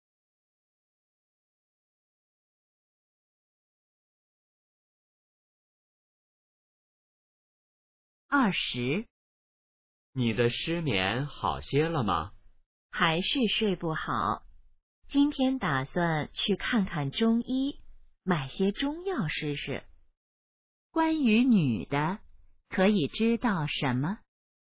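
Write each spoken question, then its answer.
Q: 关于女的,可以知道什么?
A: 她失眠,打算去看中医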